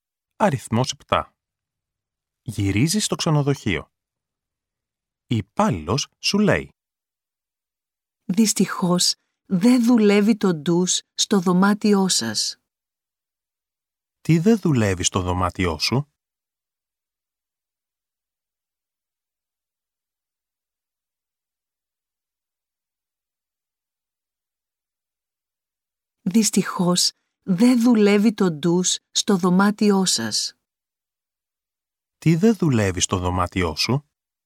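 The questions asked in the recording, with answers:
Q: «Τι δεν δουλεύει στο δωμάτιό σου?»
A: Το ντους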